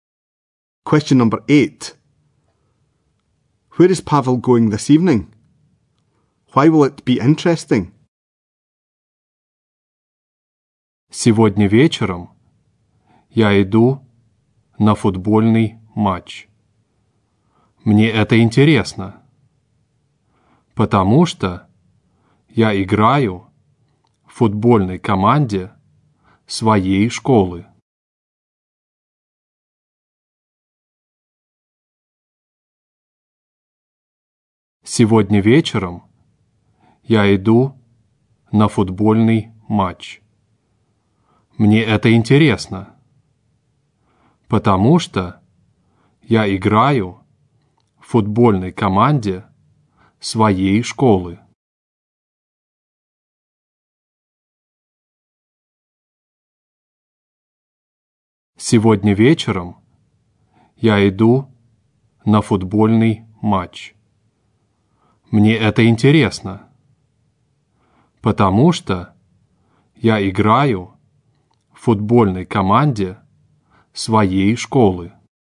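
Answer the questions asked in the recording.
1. To a football match
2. He plays in his school football team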